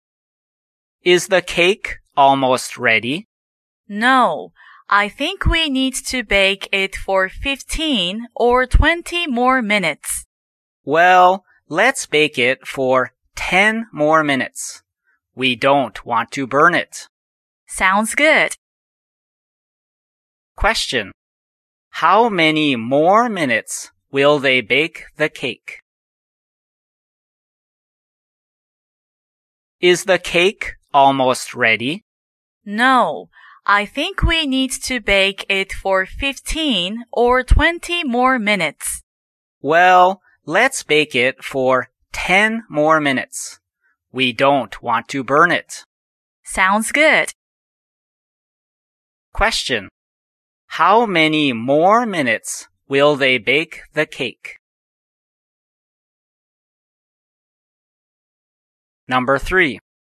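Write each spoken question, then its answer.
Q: How many more minutes will they bake the cake?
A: 10 minutes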